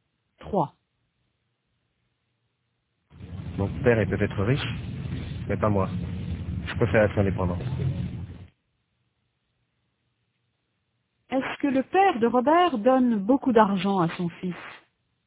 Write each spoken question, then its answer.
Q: Est-ce que le père de Robert donne beaucoup d'argent à son fils?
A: Non, Robert préfère être indépendant.